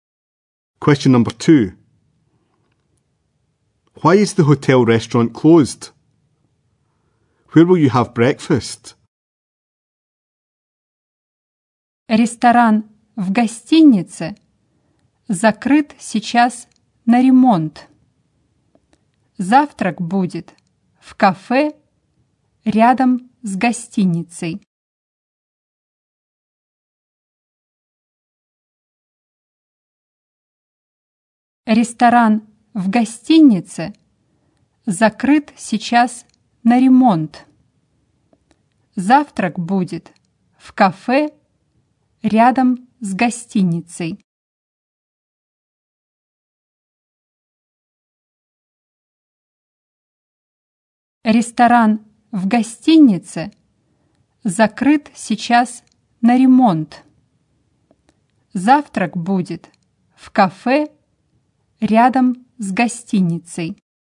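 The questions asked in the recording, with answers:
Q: Why is the hotel restaurant closed?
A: It is being renovated

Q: Where will you have breakfast?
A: In a café next to the hotel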